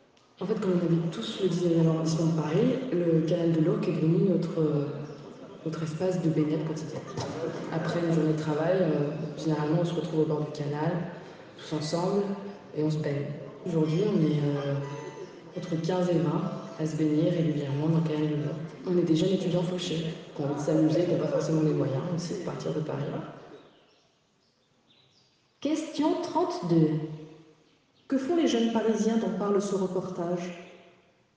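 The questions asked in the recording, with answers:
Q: Que font les jeunes parisiens dont parle ce reportage ?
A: Ils se baignent ensemble dans le canal de l'Ourcq après le travail.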